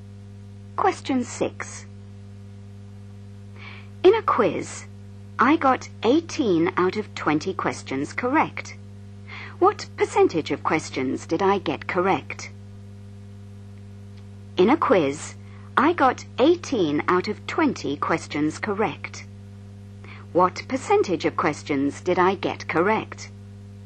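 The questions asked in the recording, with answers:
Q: What percentage of questions did I get correct?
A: 90%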